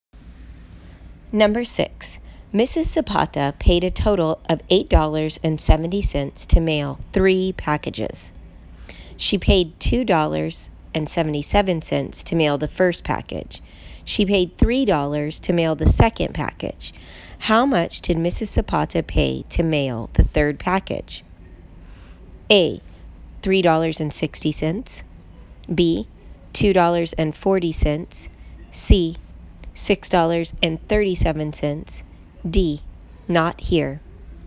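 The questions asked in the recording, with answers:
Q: How much did Mrs. Zapata pay to mail the third package?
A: D: Not here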